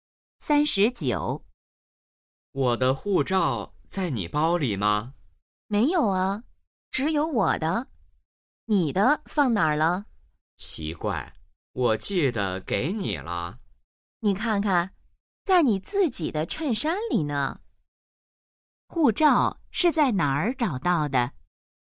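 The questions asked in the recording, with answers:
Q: 护照是在哪儿找到的?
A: 在男的自己的衬衫里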